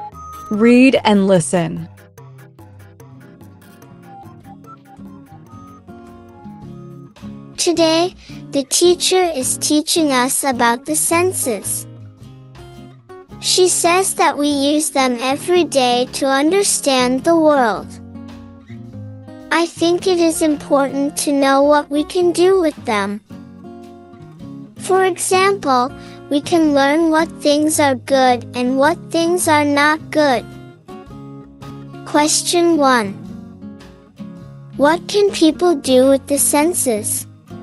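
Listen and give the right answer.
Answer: Understand the world and learn what things are good and not good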